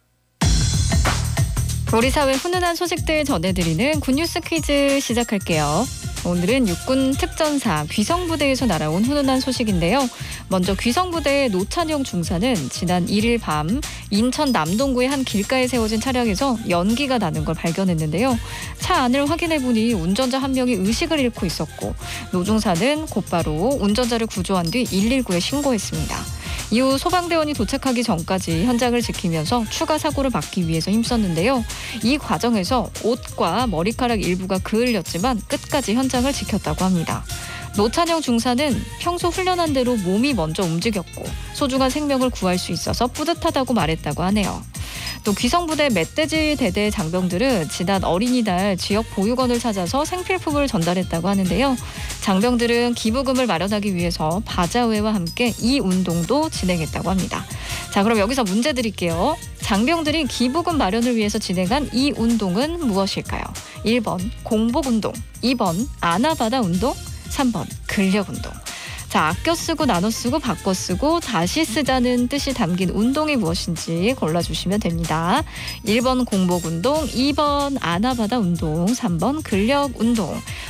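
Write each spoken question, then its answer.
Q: 장병들이 기부금 마련을 위해서 진행한 이 운동은 무엇일까요?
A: 2: 아나바다 운동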